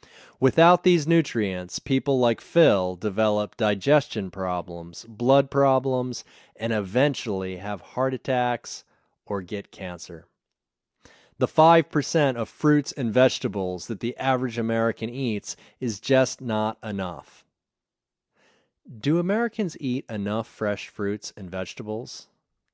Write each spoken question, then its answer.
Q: Do Americans eat enough fresh fruits and vegetables?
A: No, Americans don't eat enough fresh fruits and vegetables.